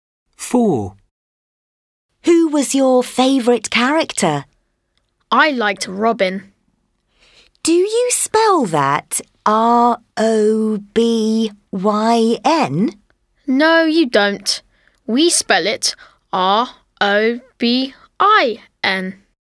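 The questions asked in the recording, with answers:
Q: Who was your favourite character?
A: Robin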